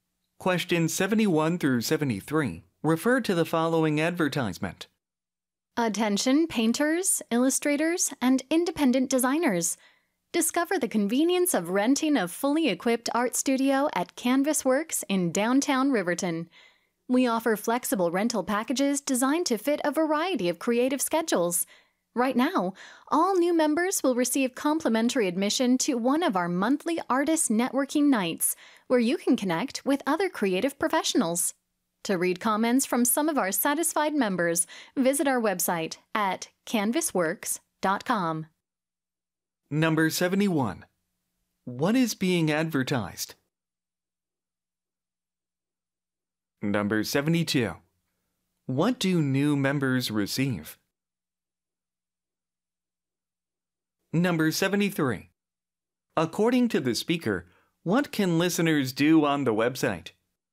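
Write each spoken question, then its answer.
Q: What is being advertised?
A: An art studio rental

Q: What do new members receive?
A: Free admission to a monthly artist networking night

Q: According to the speaker, what can listeners do on the website?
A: Read comments from satisfied members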